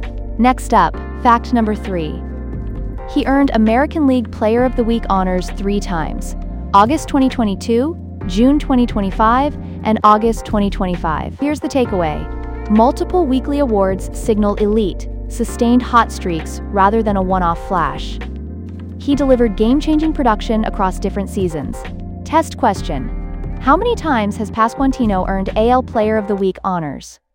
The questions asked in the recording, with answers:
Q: How many times has Pasquantino earned AL Player of the Week honors?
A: 3 times.